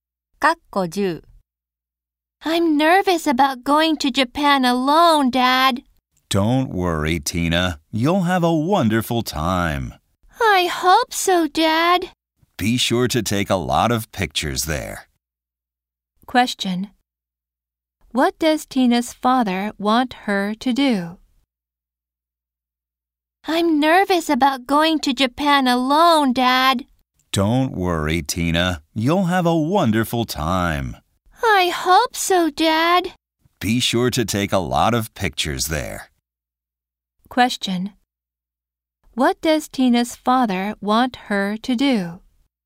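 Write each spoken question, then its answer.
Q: What does Tina's father want her to do?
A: Take a lot of pictures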